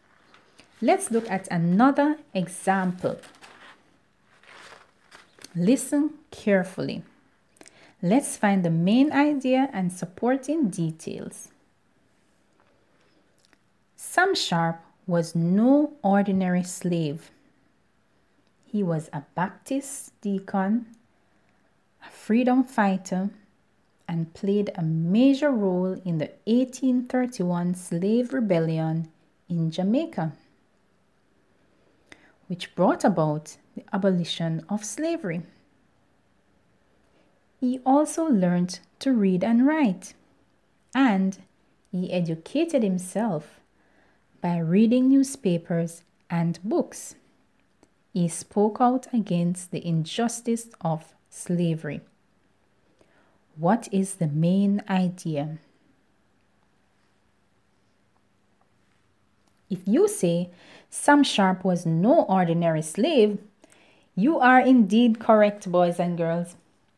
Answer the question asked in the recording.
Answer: Sam Sharp was no ordinary slave